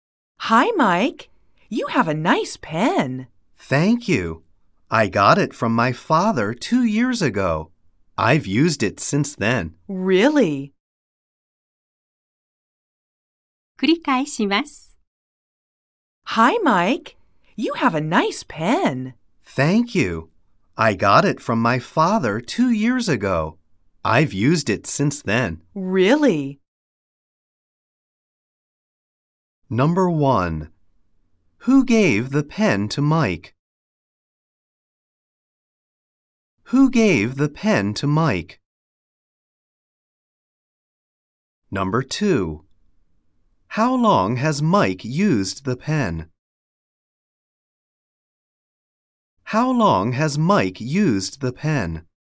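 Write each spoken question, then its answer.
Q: Who gave the pen to Mike?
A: His father

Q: How long has Mike used the pen?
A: For two years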